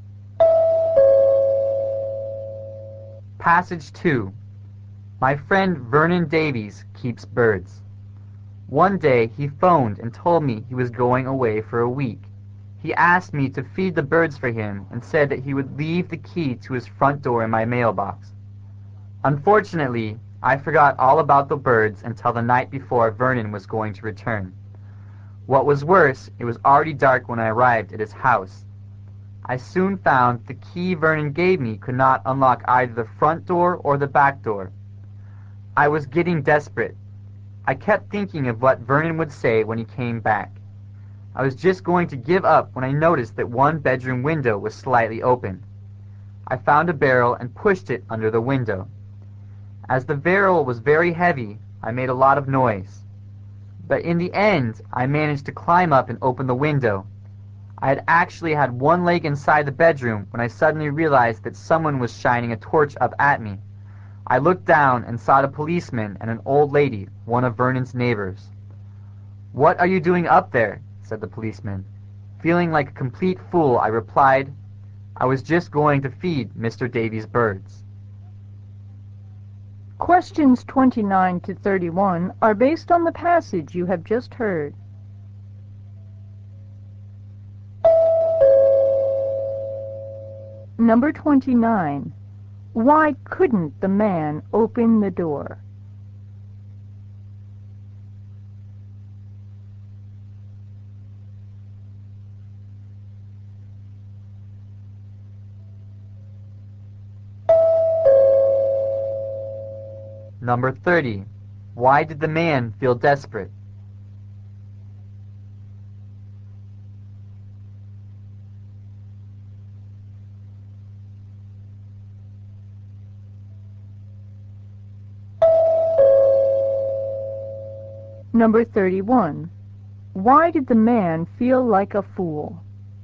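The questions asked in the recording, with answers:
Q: Why couldn't the man open the door?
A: The key didn't fit either door

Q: Why did the man feel desperate?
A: He worried about what Vernon would say when he came back

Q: Why did the man feel like a fool?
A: A policeman caught him climbing in through the window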